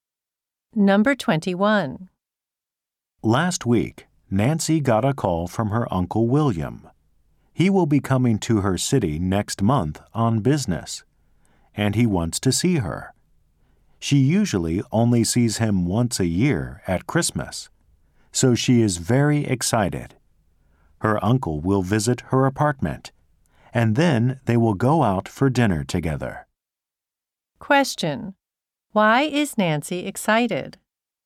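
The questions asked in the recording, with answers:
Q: Why is Nancy excited?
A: Her Uncle William is coming to visit her next month.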